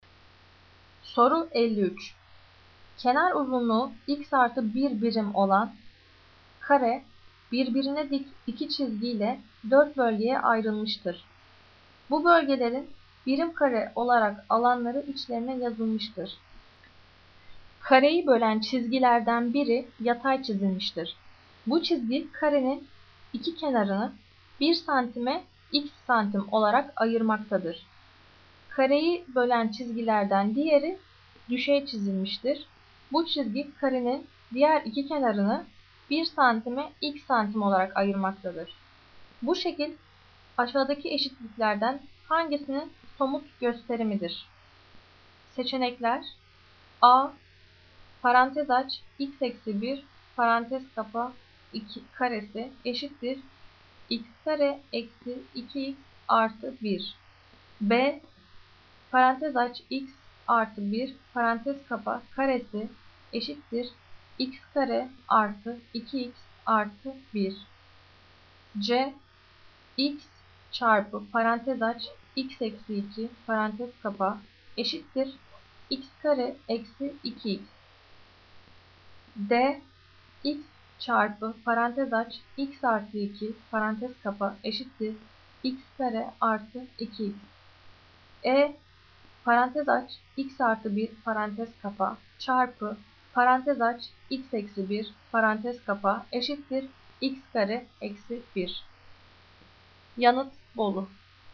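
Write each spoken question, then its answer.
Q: Bu şekil aşağıdaki eşitliklerden hangisinin somut gösterimidir?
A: B: Parantez aç x artı 1 parantez kapa karesi eşittir x kare artı 2x artı 1.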